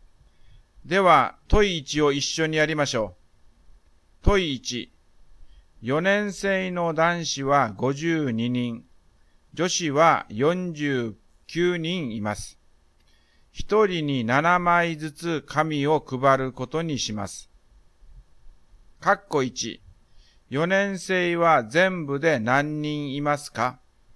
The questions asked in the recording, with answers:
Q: 4年生は全部で何人いますか?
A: 4年生は101人います。